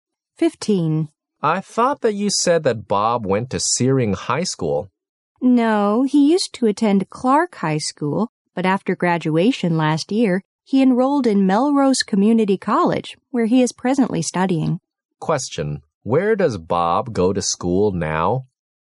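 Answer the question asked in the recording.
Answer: Melrose Community College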